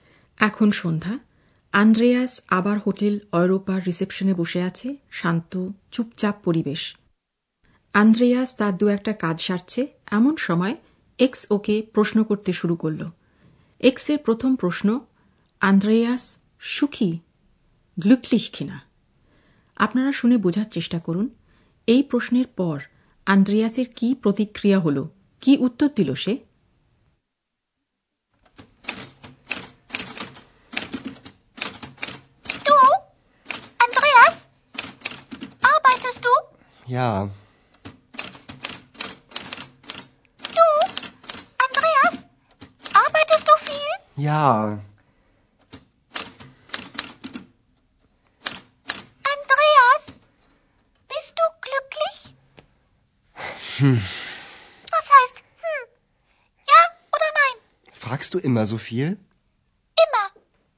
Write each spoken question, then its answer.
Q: আপনারা শুনে বোঝার চেষ্টা করুন এই প্রশ্নের পর আন্দ্রেয়াসের কি প্রতিক্রিয়া হল কি উত্তর দিল সে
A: এর উত্তরে আন্দ্রিয়াস হ্যাঁ বলবে না না বলবে বুঝতে না পেরে শুধু বলল হুম